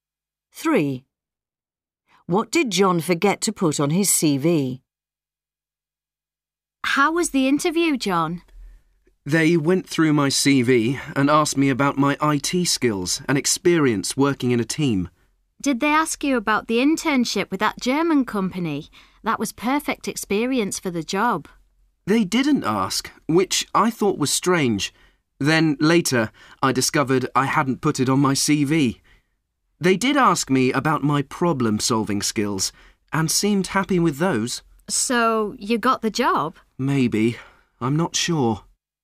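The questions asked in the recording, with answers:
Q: What did John forget to put on his CV?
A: his internship with a German company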